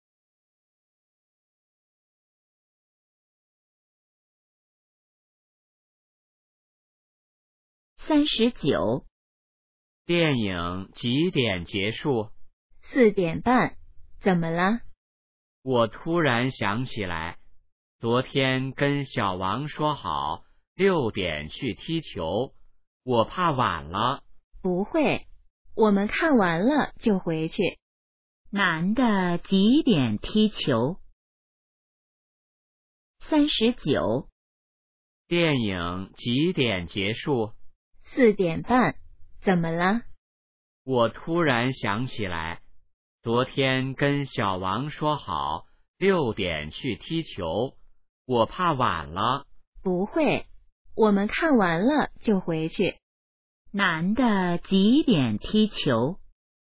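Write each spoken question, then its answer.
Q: 男的几点踢球?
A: 6点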